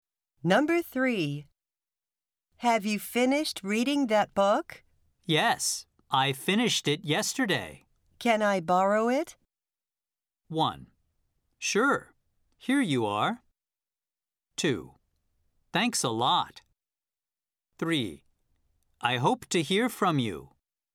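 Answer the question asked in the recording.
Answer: 1: Sure, here you are.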